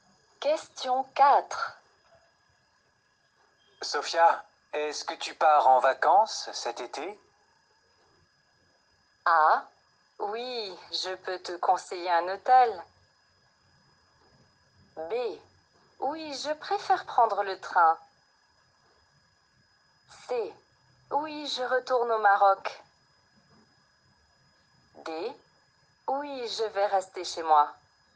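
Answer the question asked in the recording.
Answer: C: Oui, je retourne au Maroc.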